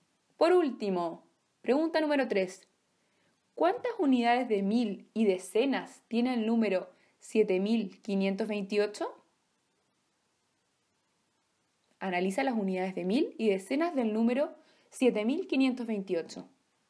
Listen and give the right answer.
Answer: Muy bien, el número 7528 tiene 7 unidades de mil y 2 decenas.